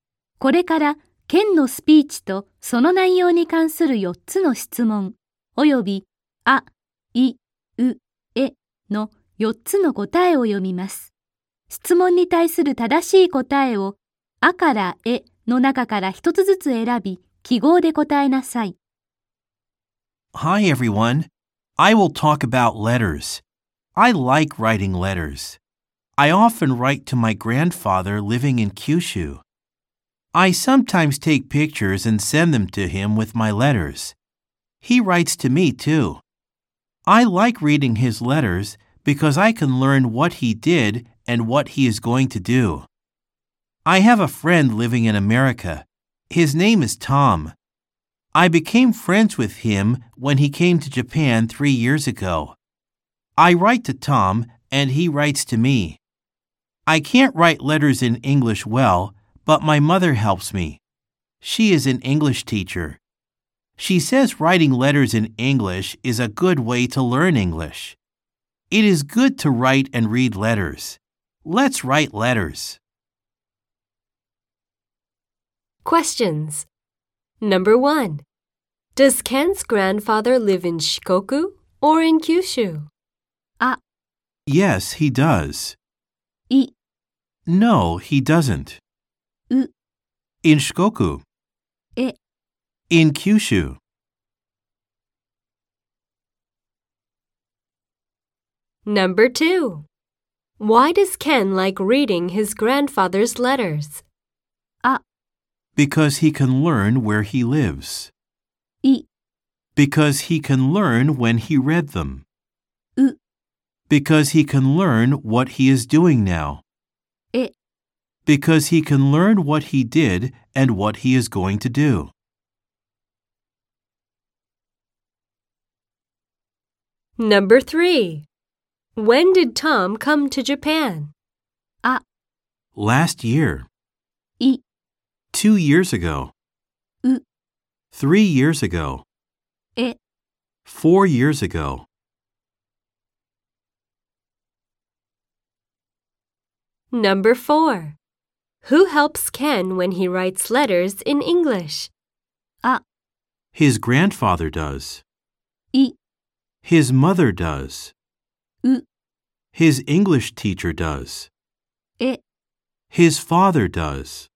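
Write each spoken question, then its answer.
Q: Does Ken's grandfather live in Shikoku or in Kyushu?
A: え: In Kyushu.

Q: Why does Ken like reading his grandfather's letters?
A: え: Because he can learn what he did and what he is going to do.

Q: When did Tom come to Japan?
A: う: 3 years ago.

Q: Who helps Ken when he writes letters in English?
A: い: His mother does.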